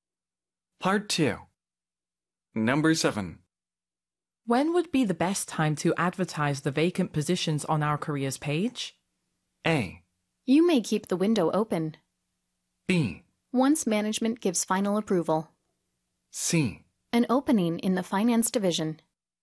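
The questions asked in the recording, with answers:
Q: When would be the best time to advertise the vacant positions on our careers page?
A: B: Once management gives final approval.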